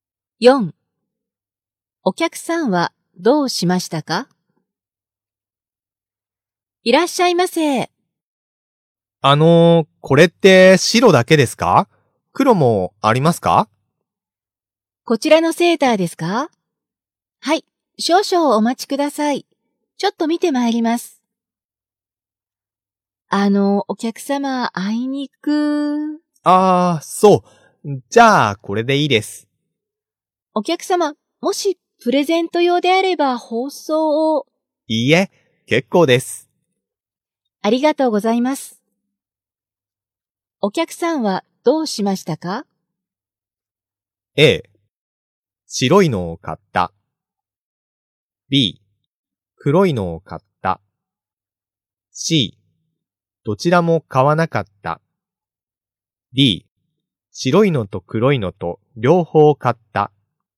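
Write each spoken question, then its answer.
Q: お客さんはどうしましたか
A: A: 白いのを買った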